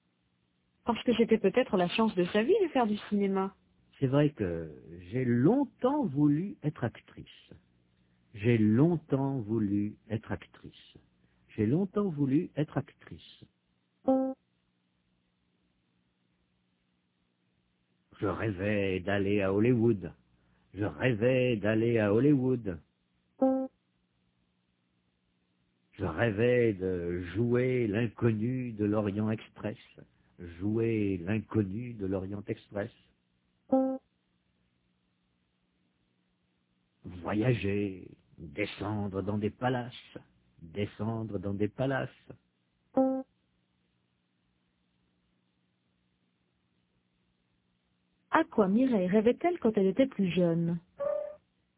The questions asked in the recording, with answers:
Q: À quoi Mireille rêvait-elle quand elle était plus jeune?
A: Elle rêvait d'aller à Hollywood.